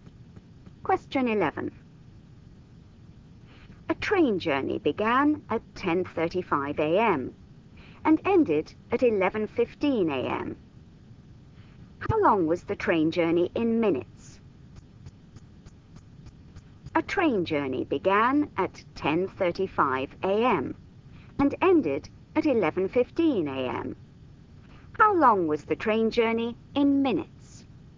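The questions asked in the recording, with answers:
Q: How long was the train journey in minutes?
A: 40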